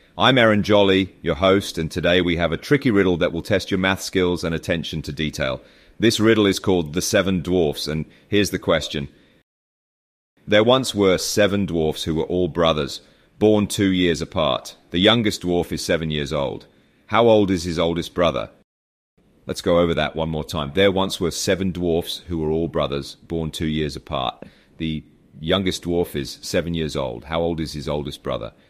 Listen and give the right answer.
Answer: The answer to the riddle is 19 years old.